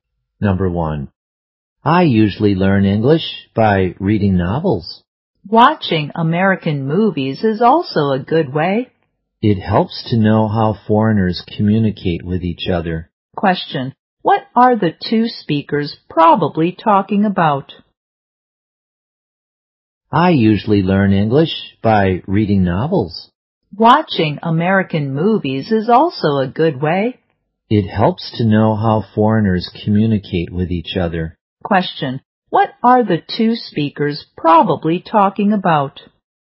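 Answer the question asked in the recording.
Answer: Ways to learn English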